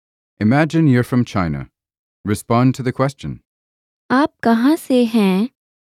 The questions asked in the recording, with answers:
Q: आप कहाँ से हैं?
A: मैं चीन से हूँ.